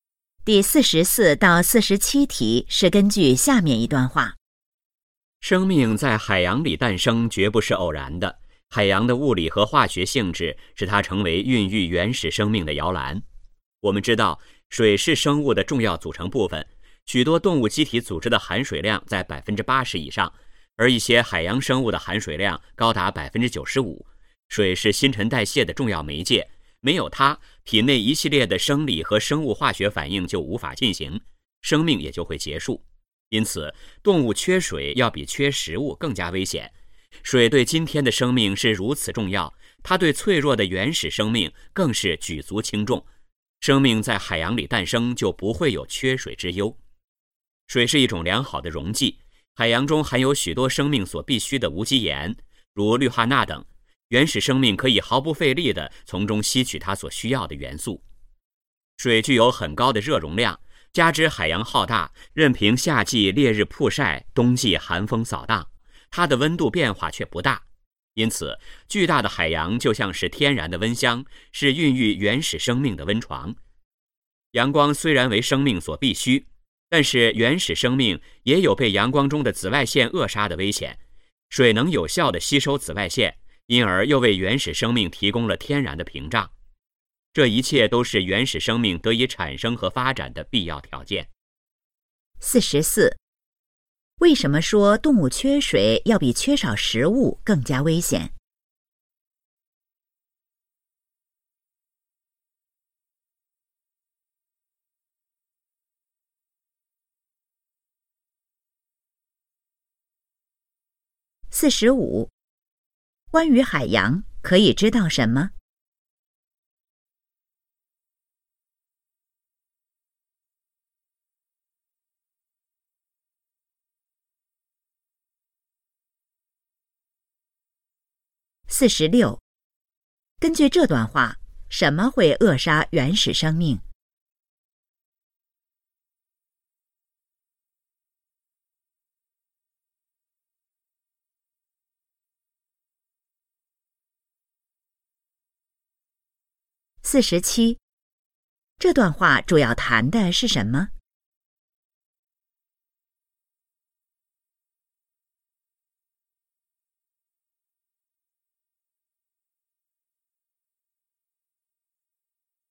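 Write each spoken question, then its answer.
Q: 为什么说动物缺水要比缺少食物更加危险?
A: 水是新陈代谢的重要媒介,没有水生命就会结束

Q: 根据这段话,什么会扼杀原始生命?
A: 阳光中的紫外线

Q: 这段话主要谈的是什么?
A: 生命为什么诞生在海洋里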